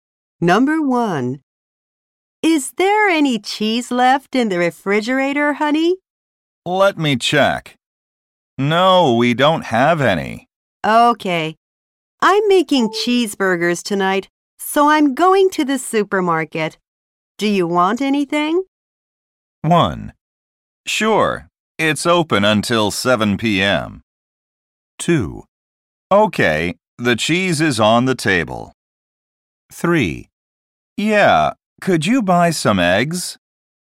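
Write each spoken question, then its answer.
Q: Do you want anything?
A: 3: Yeah, could you buy some eggs?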